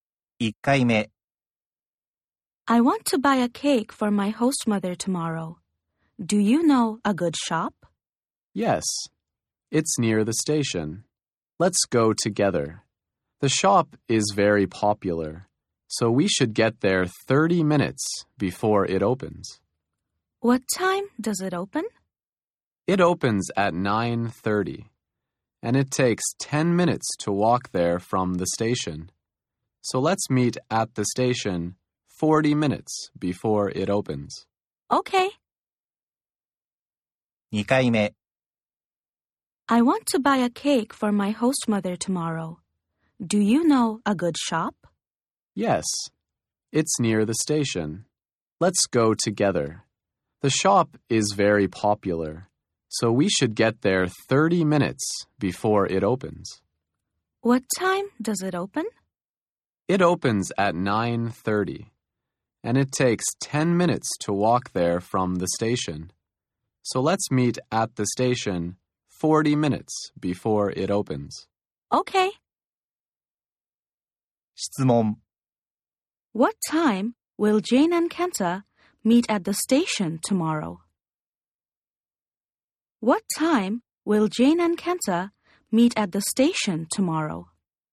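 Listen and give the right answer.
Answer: At 8:50.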